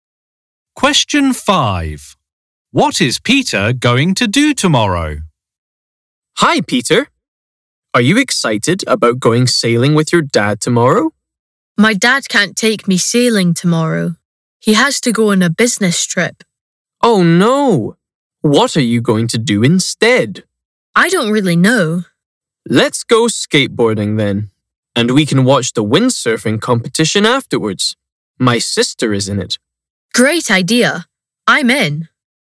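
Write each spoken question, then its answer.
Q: What is Peter going to do tomorrow?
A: Go skateboarding, then watch the windsurfing competition.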